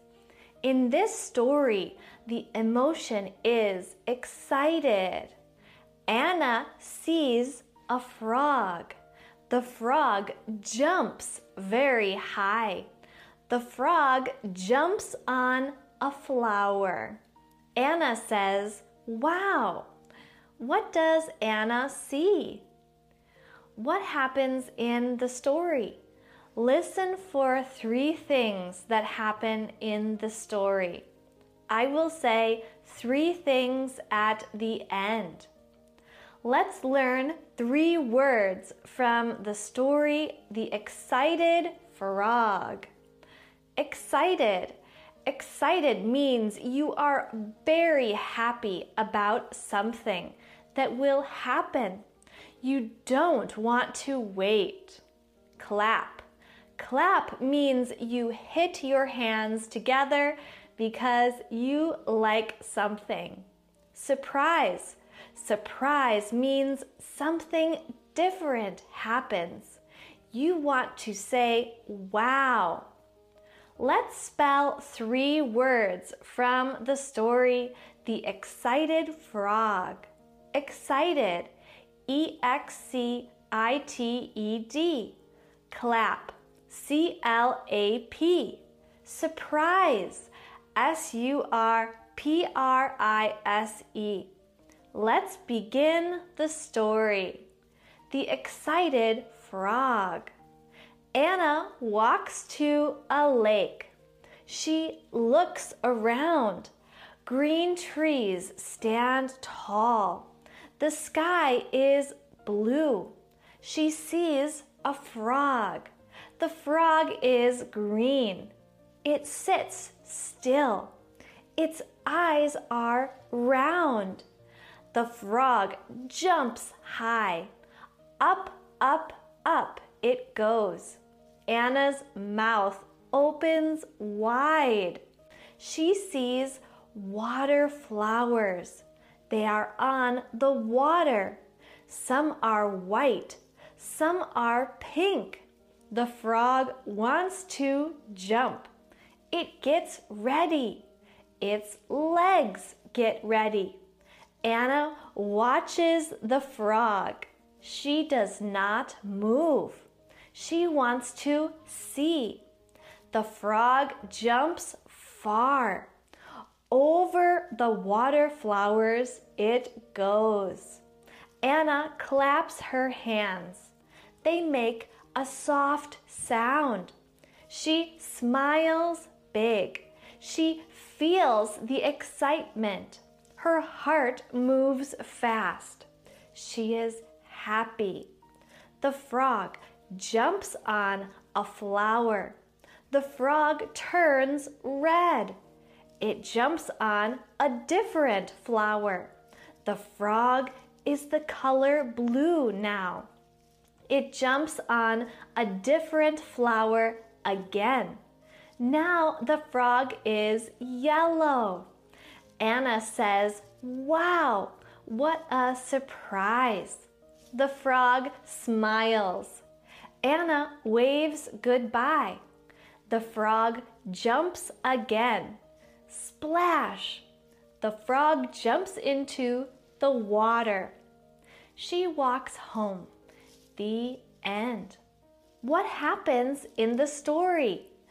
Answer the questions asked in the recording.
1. Anna sees a green frog.
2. 1. Anna sees a green frog. She is excited. 2. The frog jumps on the flowers. 3. The green frog is many different colors.